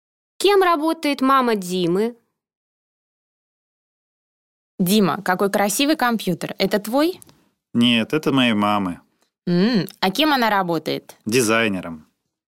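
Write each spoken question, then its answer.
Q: Кем работает мама Димы?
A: Дизайнером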